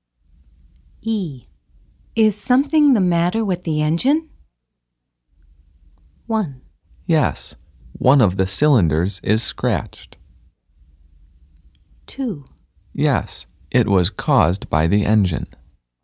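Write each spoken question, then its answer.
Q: Is something the matter with the engine?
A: 1: Yes, one of the cylinders is scratched.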